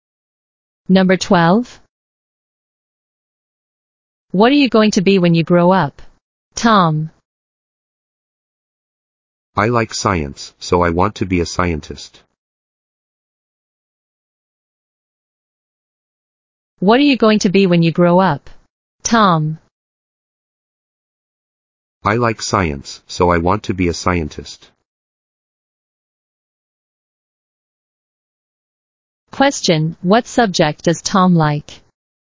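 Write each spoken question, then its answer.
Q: Question, what subject does Tom like?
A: Science.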